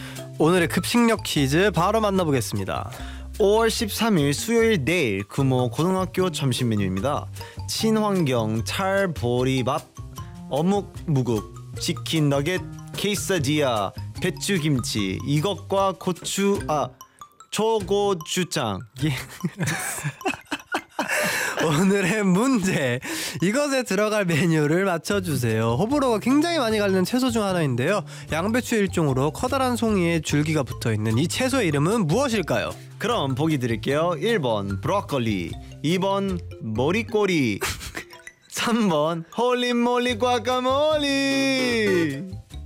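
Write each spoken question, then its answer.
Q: 양배추 일종으로 커다란 송이에 줄기가 붙어있는 이 채소의 이름은 무엇일까요?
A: 1: 브로콜리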